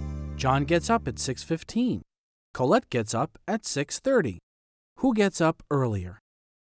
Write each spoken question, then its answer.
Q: Who gets up earlier?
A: John does. John gets up earlier than Colette.